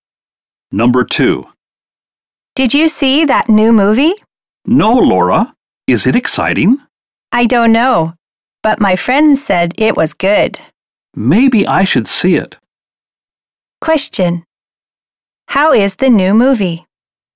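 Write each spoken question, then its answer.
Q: How is the new movie?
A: Good, according to the speaker's friend.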